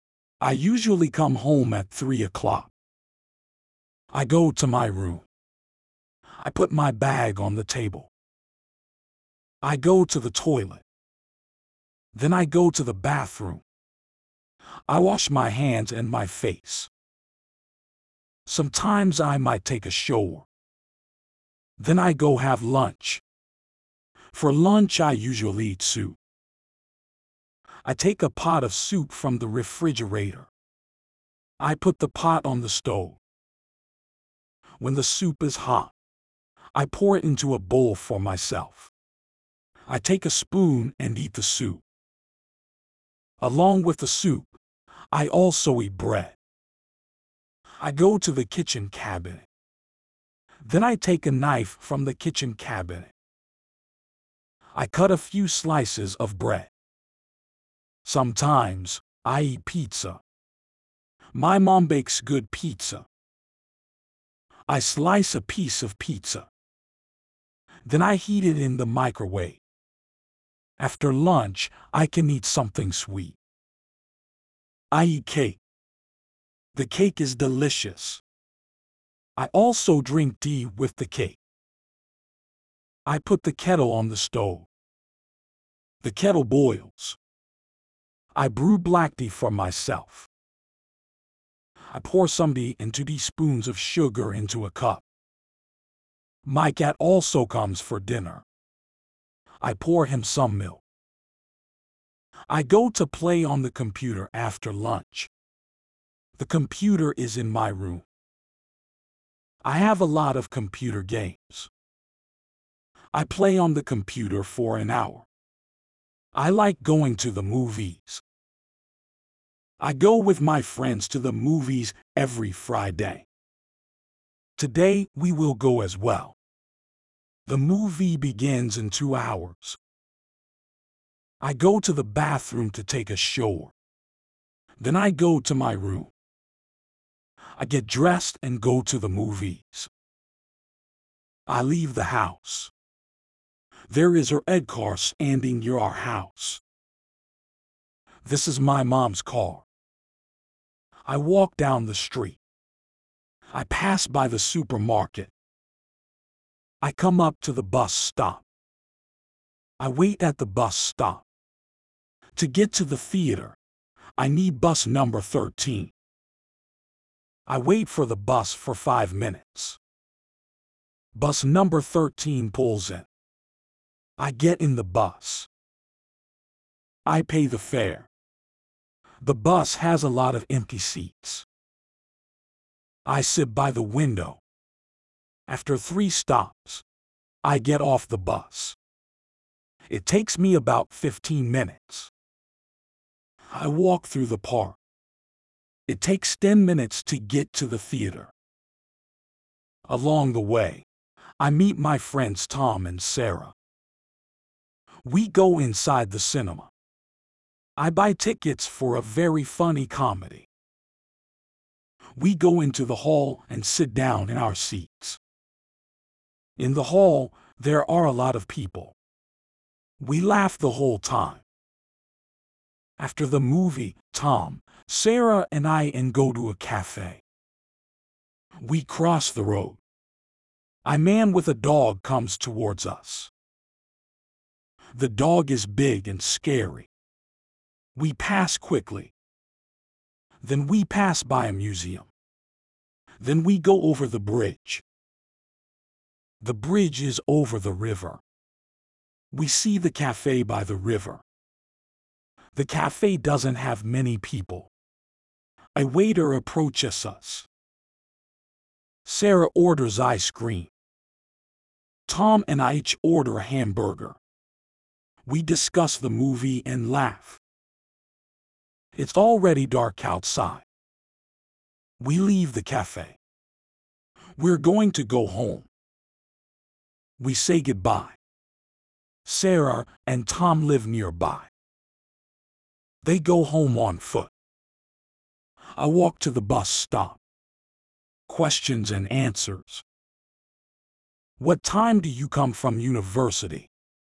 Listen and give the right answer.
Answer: I come at 3 o'clock.